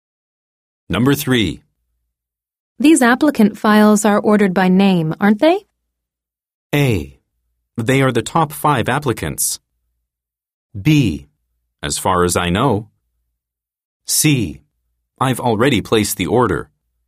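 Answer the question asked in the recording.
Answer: B: As far as I know.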